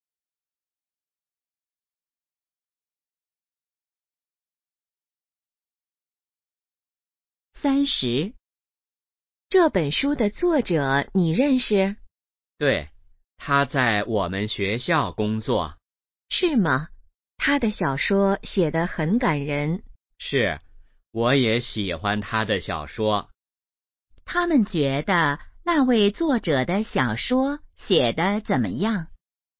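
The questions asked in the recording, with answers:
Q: 他们觉得那位作者的小说写得怎么样?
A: 很感人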